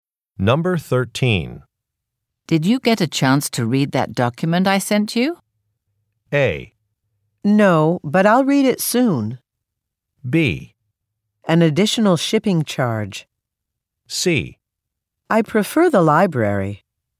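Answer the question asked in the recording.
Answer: A: No, but I'll read it soon.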